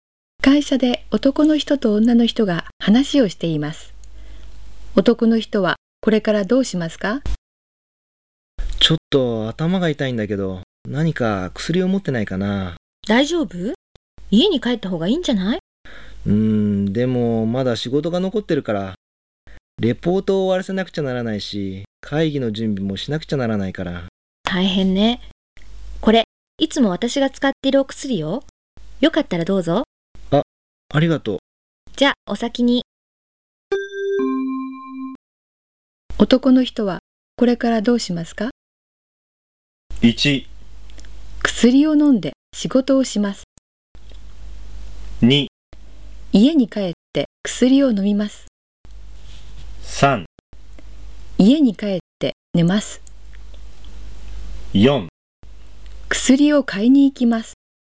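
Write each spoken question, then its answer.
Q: 男の人はこれからどうしますか?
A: 1: 薬を飲んで仕事をします。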